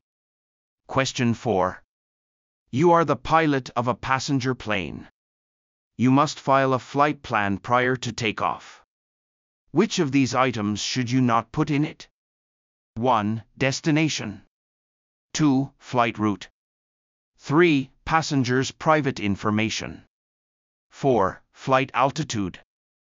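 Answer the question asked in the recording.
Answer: 3: Passengers' private information.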